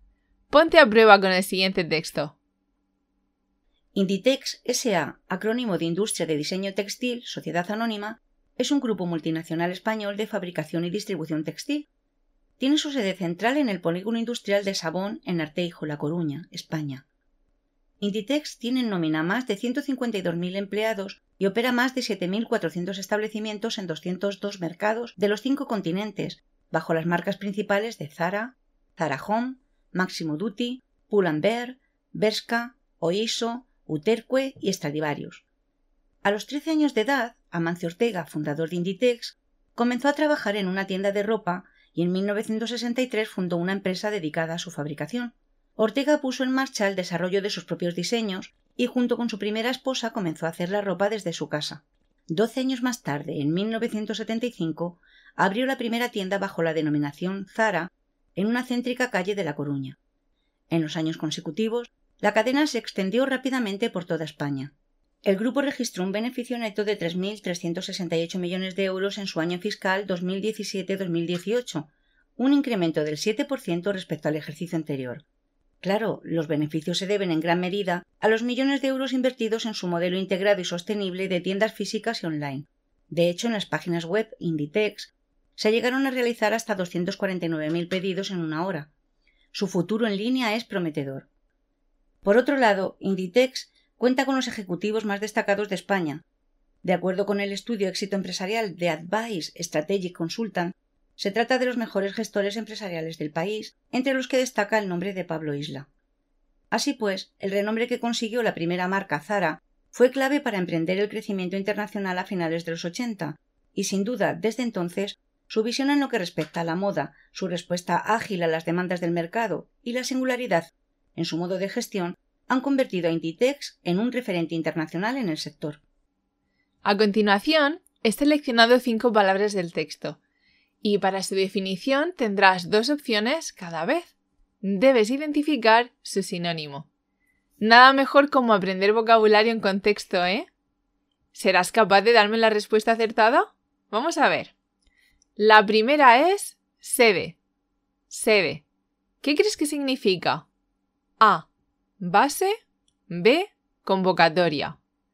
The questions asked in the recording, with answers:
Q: Sede. ¿Qué crees que significa?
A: La respuesta correcta es base.